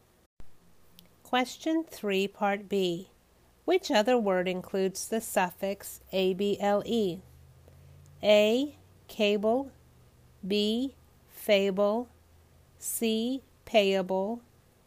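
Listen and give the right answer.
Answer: C: Payable.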